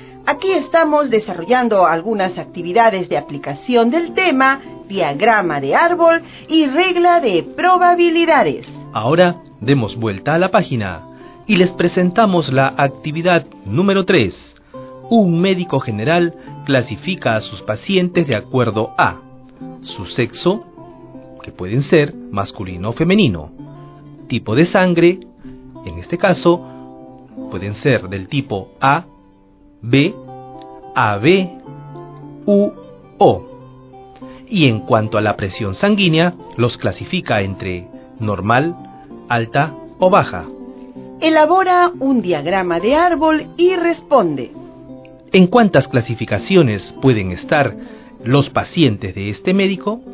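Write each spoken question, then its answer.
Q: ¿En cuántas clasificaciones pueden estar los pacientes de este médico?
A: 24 clasificaciones (2 × 4 × 3)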